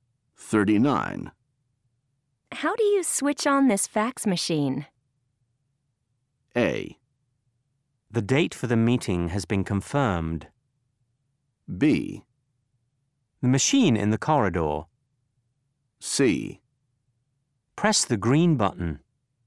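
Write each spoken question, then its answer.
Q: How do you switch on this fax machine?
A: C: Press the green button.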